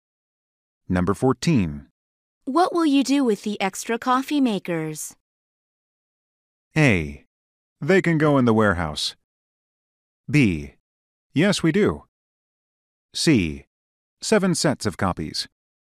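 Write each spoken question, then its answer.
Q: What will you do with the extra coffee makers?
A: A: They can go in the warehouse.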